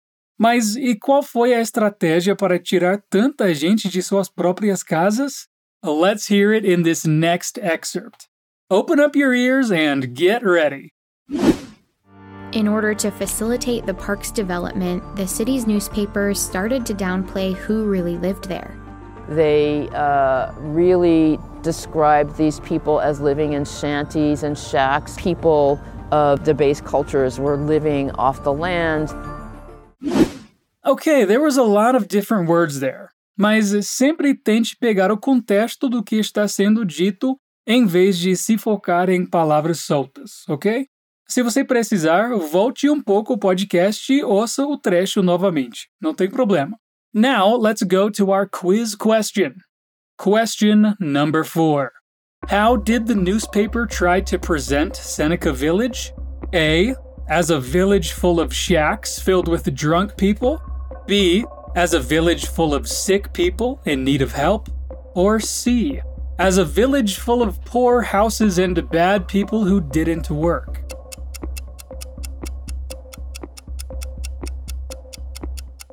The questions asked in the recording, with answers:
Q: How did the newspaper try to present Seneca Village?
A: The correct answer is C, which is actually a whole lot of lies.